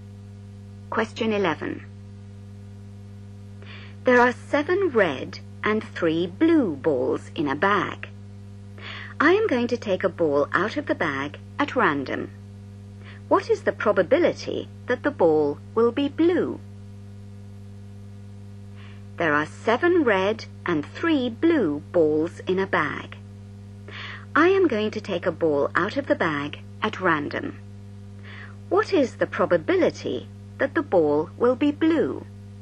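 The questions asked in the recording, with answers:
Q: What is the probability that the ball will be blue?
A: 3/10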